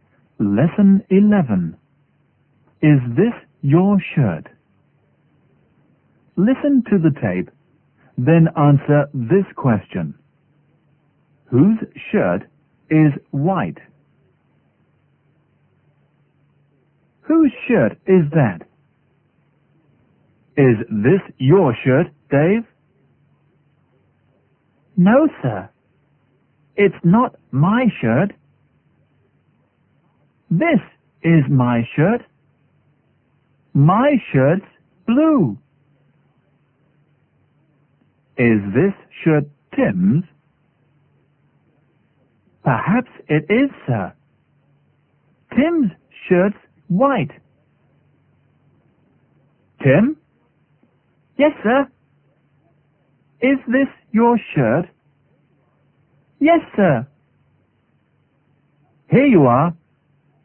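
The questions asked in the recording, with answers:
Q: Whose shirt is white?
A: Tim's shirt is white.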